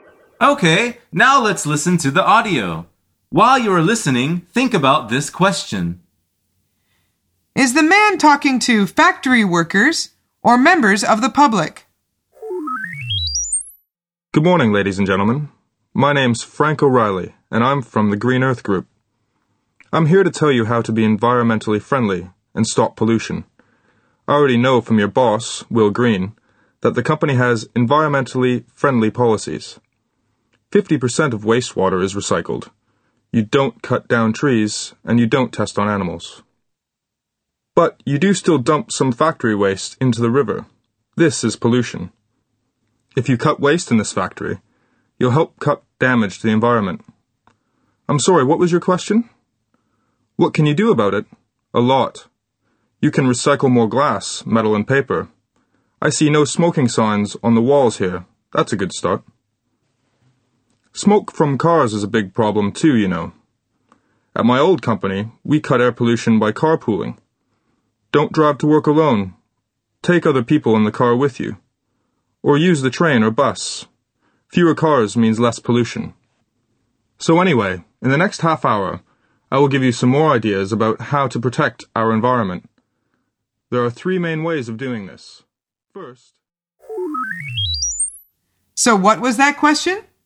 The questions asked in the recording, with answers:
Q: Is the man talking to factory workers or members of the public?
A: The answer is factory workers.